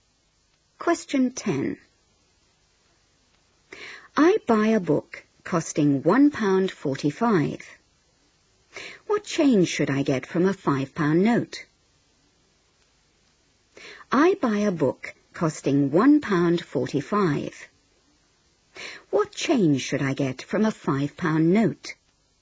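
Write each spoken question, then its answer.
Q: What change should I get from a £5 note?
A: £3.55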